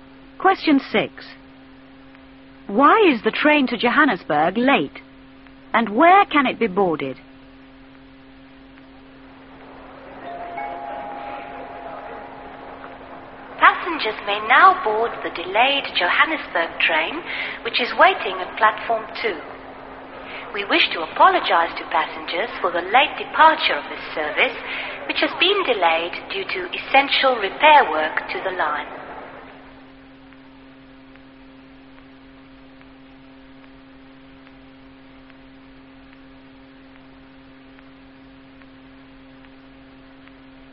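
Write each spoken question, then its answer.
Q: Why is the train to Johannesburg late?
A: Because of essential repair work to the line

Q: And where can it be boarded?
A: At Platform 2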